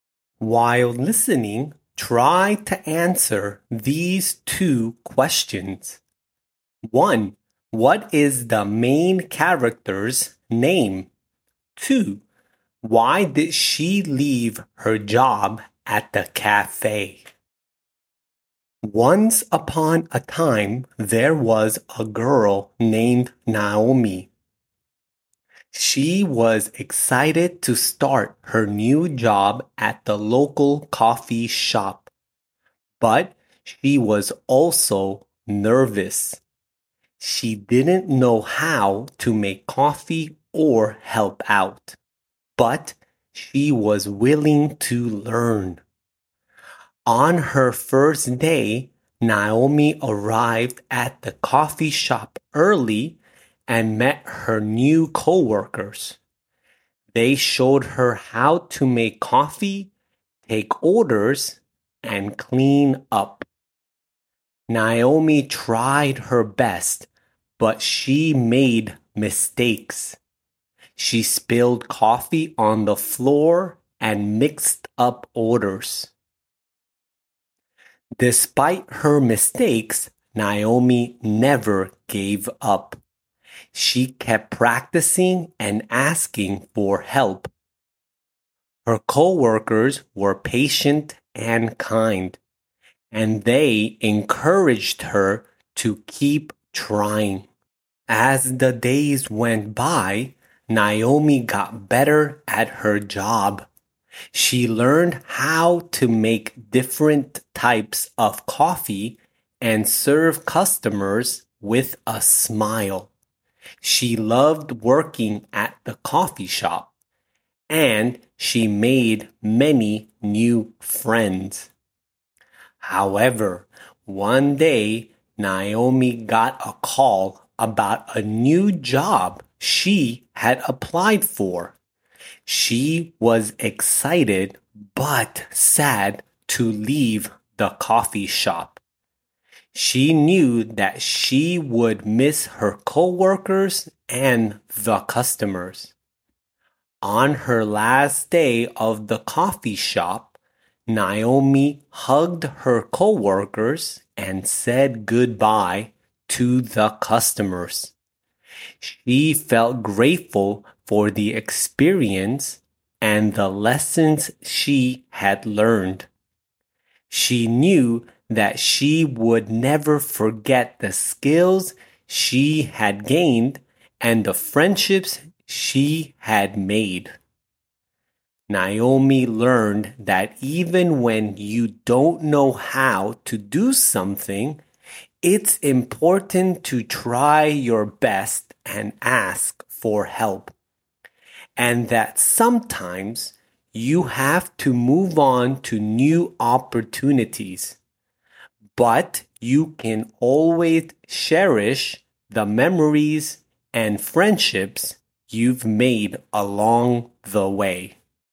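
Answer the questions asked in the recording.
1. Naomi
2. She got a new job she had applied for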